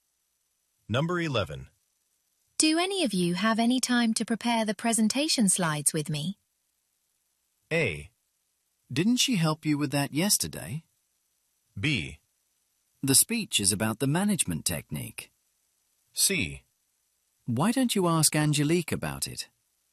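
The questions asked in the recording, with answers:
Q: Do any of you have any time to prepare the presentation slides with me?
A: C: Why don't you ask Angelique about it?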